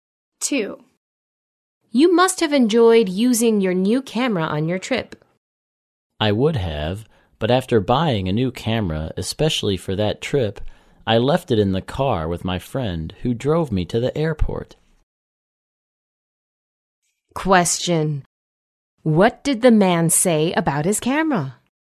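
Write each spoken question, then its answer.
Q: What did the man say about his camera?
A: He left it in his friend's car, so he didn't use it on the trip.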